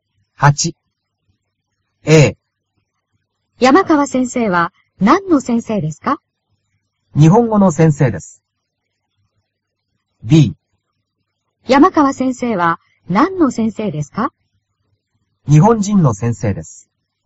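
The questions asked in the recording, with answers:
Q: 山川先生は何の先生ですか?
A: A: 日本語の先生です。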